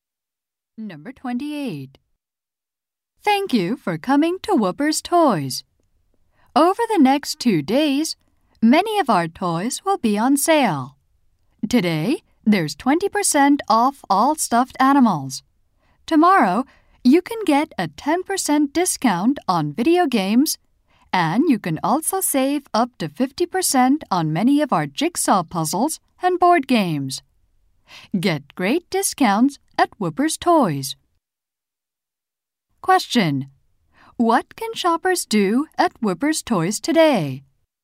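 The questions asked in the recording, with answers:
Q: What can shoppers do at Whoopers Toys today?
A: Get 20% off stuffed animals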